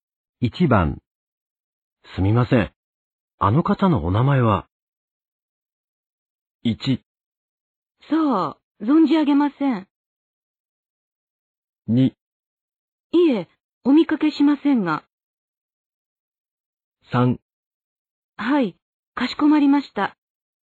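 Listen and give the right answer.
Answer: 1: そう、存じ上げません。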